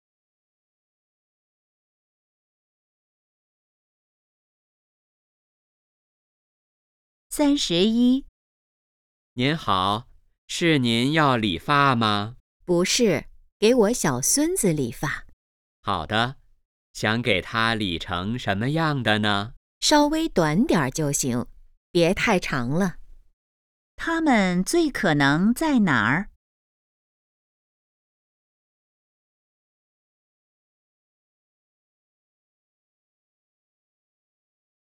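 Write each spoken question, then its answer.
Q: 它们最可能在哪儿?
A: 理发店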